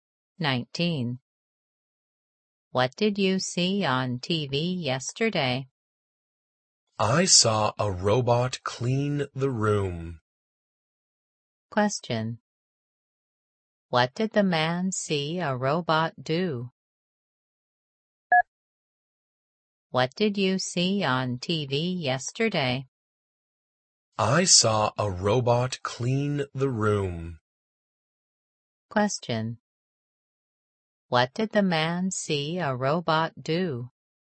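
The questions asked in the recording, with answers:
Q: What did the man see a robot do?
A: Clean the room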